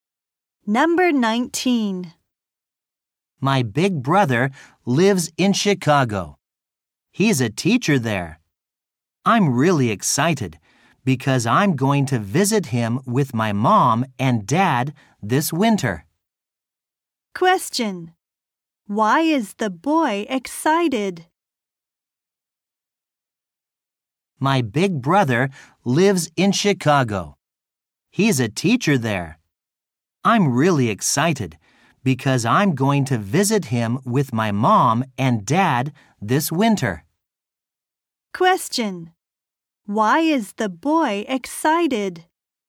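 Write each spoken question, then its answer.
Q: Why is the boy excited?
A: He is going to visit his brother in Chicago this winter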